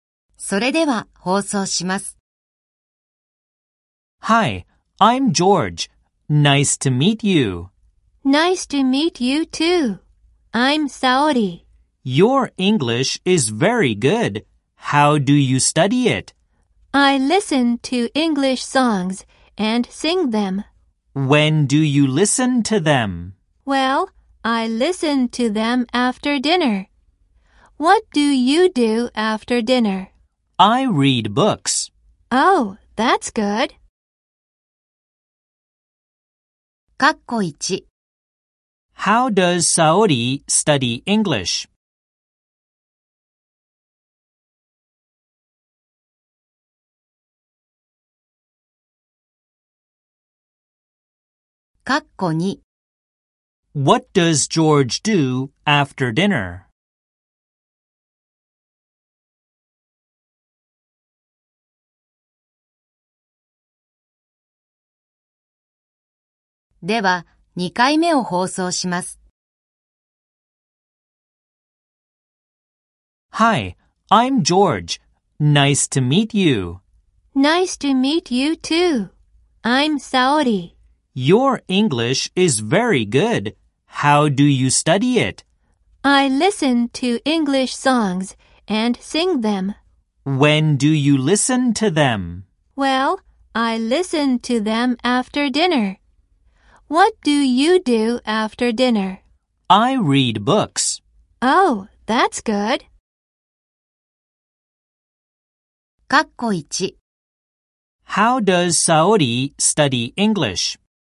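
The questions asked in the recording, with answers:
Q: How does Saori study English?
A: She listens to English songs and sings them.

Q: What does George do after dinner?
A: He reads books.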